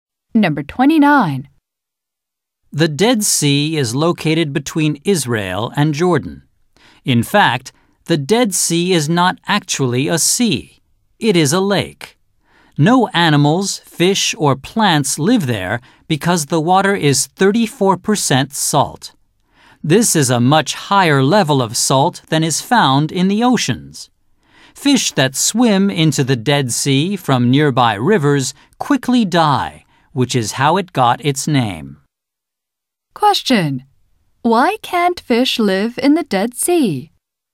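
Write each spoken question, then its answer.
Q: Why can't fish live in the Dead Sea?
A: Because the water is 34% salt, far saltier than the oceans.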